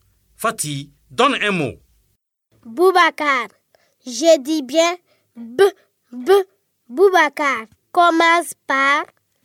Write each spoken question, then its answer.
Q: Commence par...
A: Bravo les élèves. Boubacar commence par B.